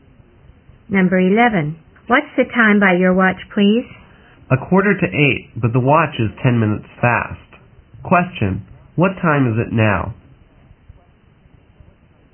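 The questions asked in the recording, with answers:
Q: What time is it now?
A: 7:35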